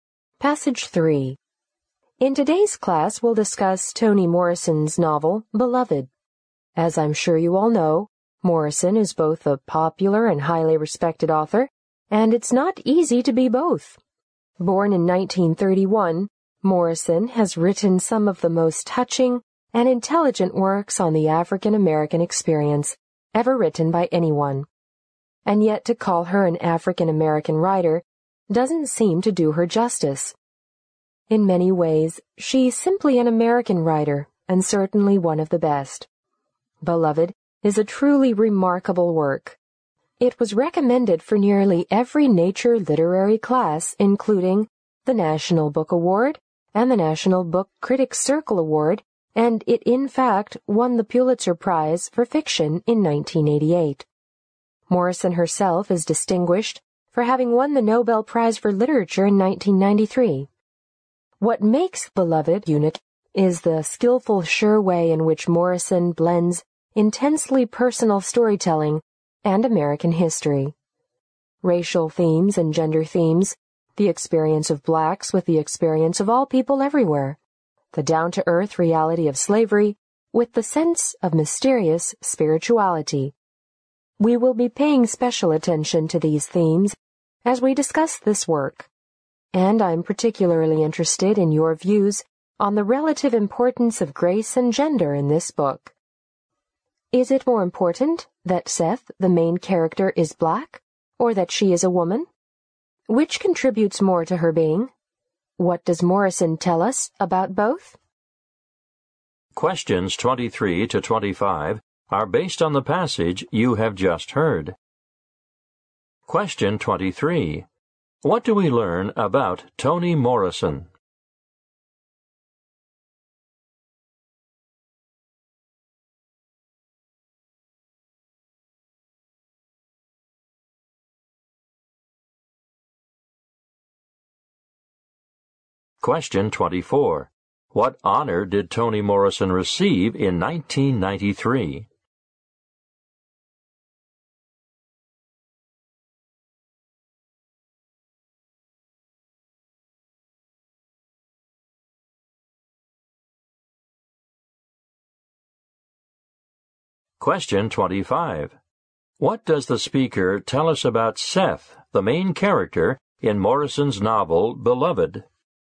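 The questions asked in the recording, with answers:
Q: What do we learn about Toni Morrison?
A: She is both a popular and highly respected author

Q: What honor did Toni Morrison receive in 1993?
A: The Nobel Prize for Literature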